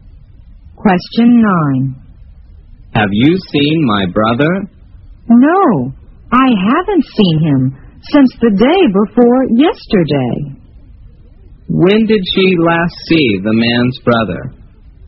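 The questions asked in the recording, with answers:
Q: When did she last see the man's brother?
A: The day before yesterday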